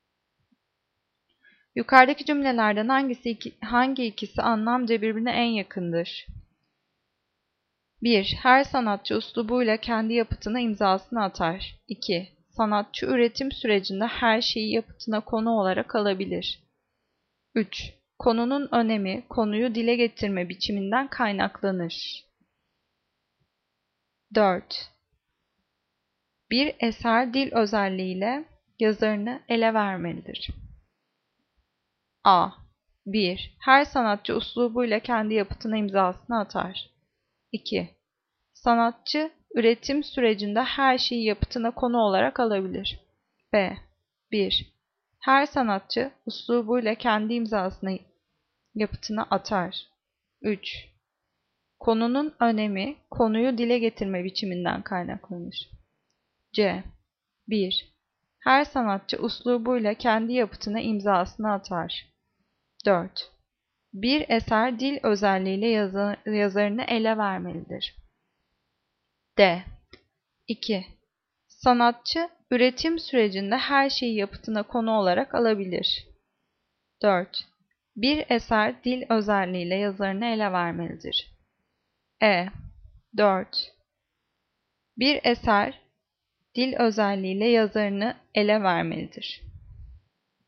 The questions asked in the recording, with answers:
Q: Yukarıdaki cümlelerden hangi ikisi anlamca birbirine en yakındır?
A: Cevap C. Her sanatçı üslubuyla kendi yapıtına imzasını atar.